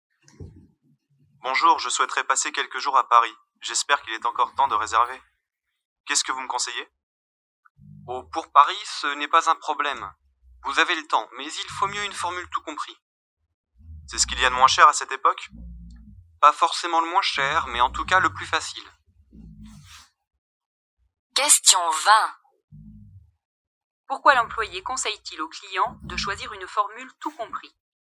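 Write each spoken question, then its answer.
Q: Pourquoi l'employé conseille-t-il au client de choisir une formule tout compris?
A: Parce que c'est le plus facile.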